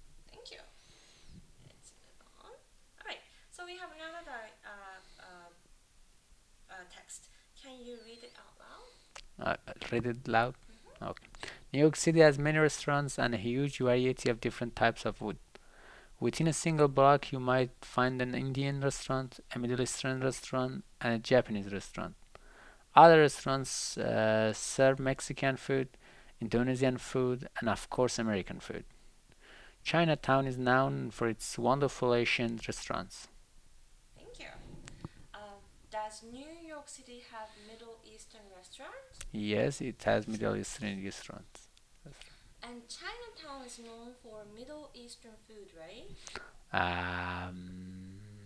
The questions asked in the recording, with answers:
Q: And Chinatown is known for Middle Eastern food, right?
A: No, China is now China Chinatown is known for Asian restaurants.